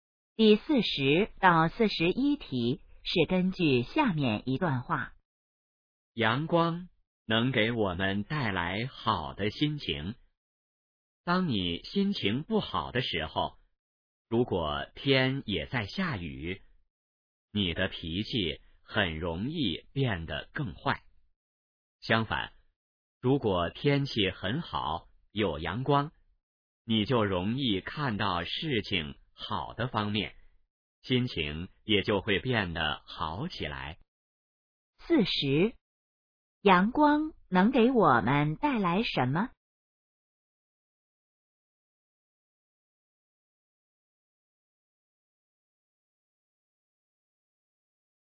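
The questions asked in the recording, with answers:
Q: 阳光能给我们带来什么?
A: 好的心情

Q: 这段话主要谈什么?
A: 阳光对心情的影响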